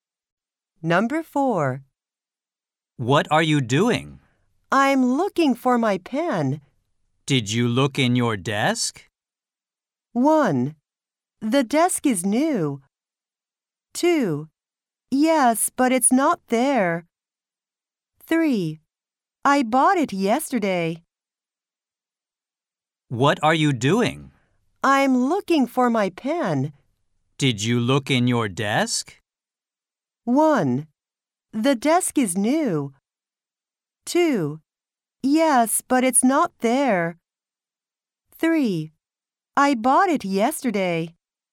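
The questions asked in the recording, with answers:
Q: Did you look in your desk?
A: 2: Yes, but it's not there.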